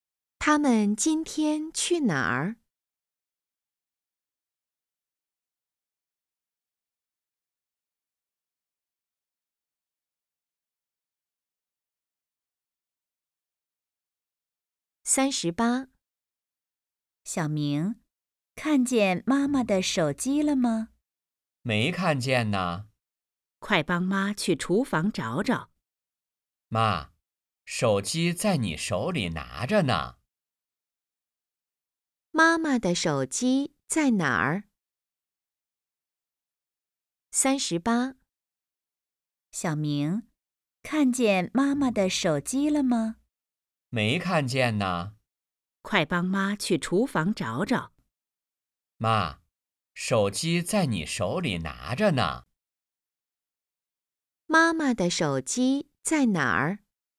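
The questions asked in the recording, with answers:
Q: 妈妈的手机在哪儿?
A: 在妈妈手里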